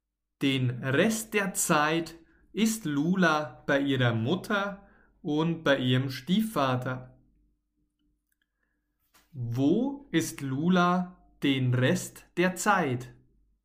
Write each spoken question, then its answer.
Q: Wo ist Lula den Rest der Zeit?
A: bei ihrer Mutter und Stiefvater.